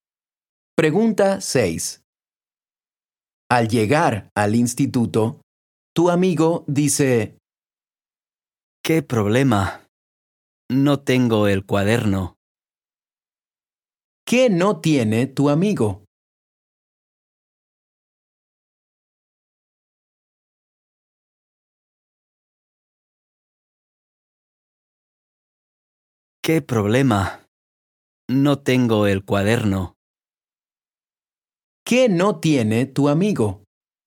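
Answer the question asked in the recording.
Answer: el cuaderno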